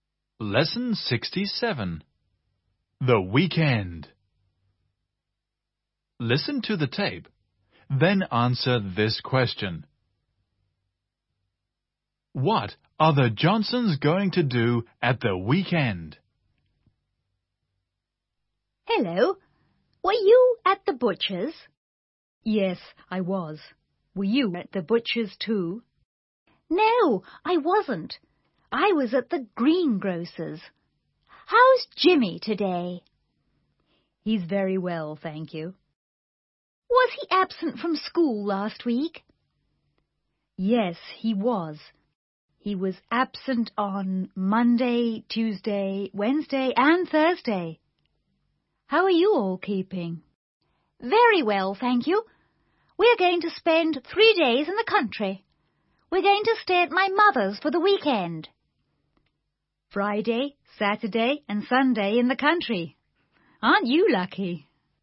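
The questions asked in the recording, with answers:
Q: What are the Johnsons going to do at the weekend?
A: Spend three days in the country at Mrs. Johnson's mother's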